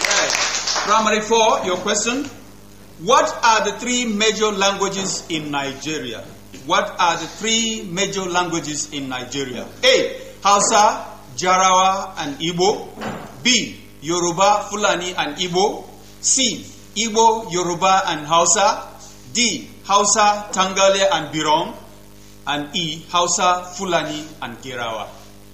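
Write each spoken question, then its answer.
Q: What are the three major languages in Nigeria?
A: C: Igbo, Yoruba, and Hausa.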